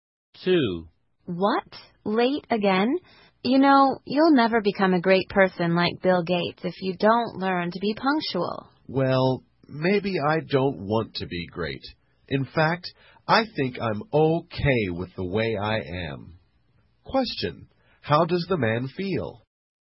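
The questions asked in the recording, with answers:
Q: How does the man feel?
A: He is content with the way he is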